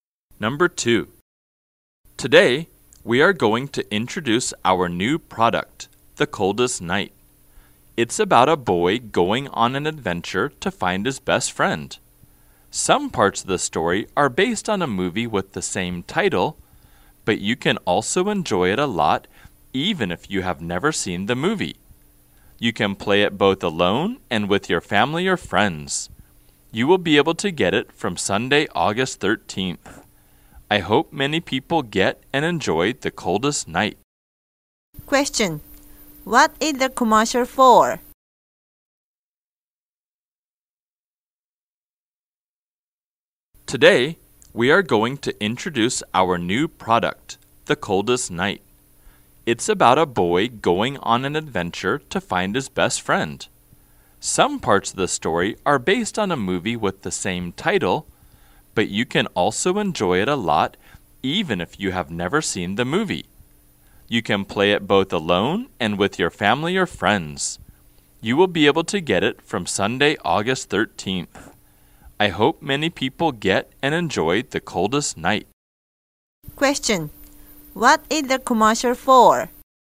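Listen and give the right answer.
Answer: A new game, The Coldest Night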